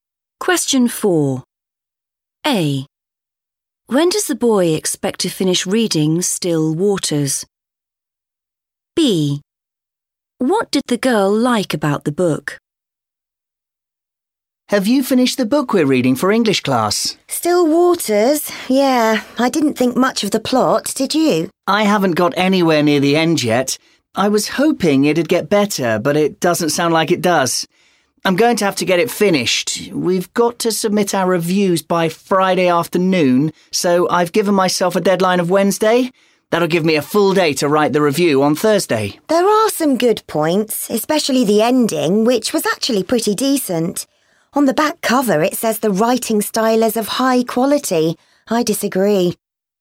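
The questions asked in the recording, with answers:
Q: When does the boy expect to finish reading Still Waters?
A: Wednesday

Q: What did the girl like about the book?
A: the ending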